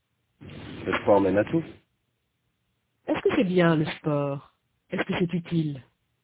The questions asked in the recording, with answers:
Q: Est-ce que c'est bien le sport?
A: Oui. Le sport mène à tout.

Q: Est-ce que c'est utile?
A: Oui. Le sport mène à tout.